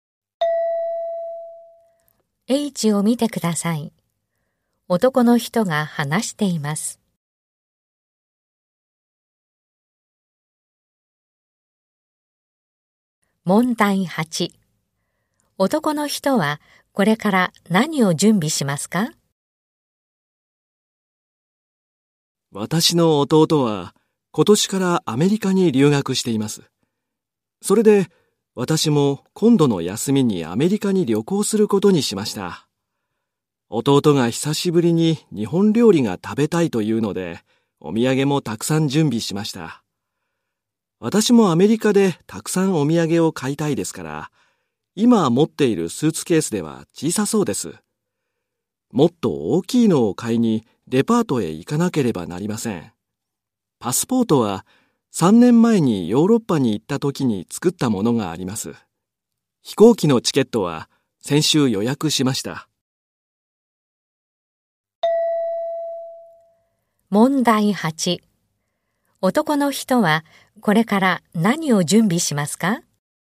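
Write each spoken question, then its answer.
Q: 男の人はこれから何を準備しますか?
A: 大きいスーツケース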